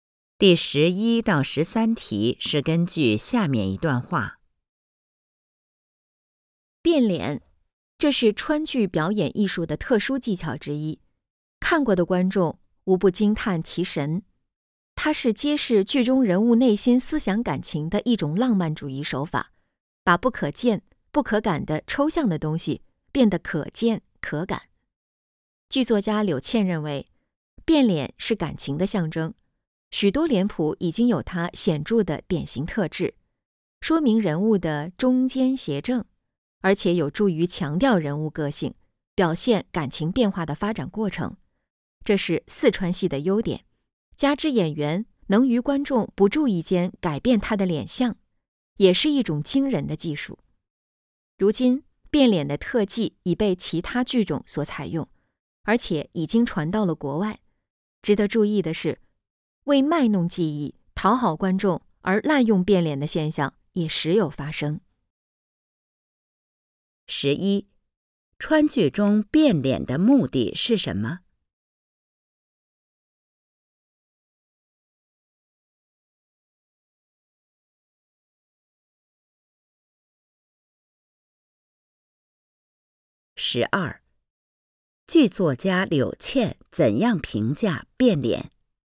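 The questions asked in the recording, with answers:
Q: 川剧中变脸的目的是什么?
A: 揭示剧中人物的内心思想感情

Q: 剧作家柳倩怎样评价变脸?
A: 变脸是感情的象征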